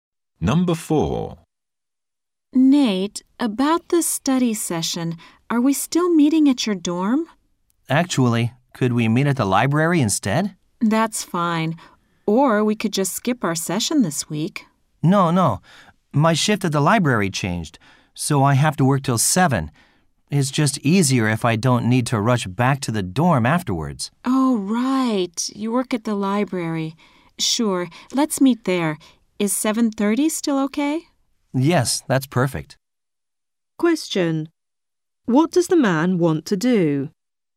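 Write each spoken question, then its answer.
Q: What does the man want to do?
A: Meet at the library instead of his dorm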